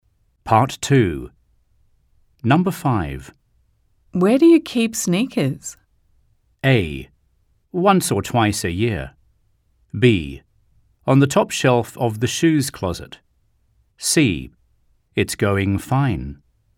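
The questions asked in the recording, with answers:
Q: Where do you keep sneakers?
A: B: On the top shelf of the shoes closet.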